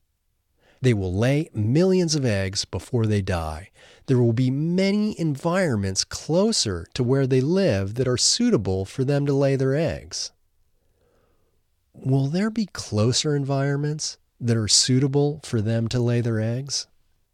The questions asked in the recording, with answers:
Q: Will there be closer environments that are suitable for them to lay their eggs?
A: Yes, there will be closer environments that are suitable for them to lay their eggs.